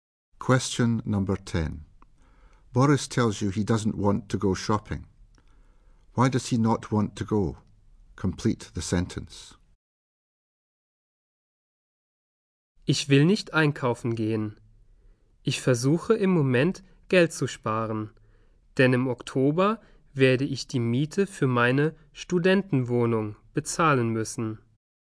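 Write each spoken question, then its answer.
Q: Why does he not want to go?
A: He is saving money to pay the rent for his student flat in October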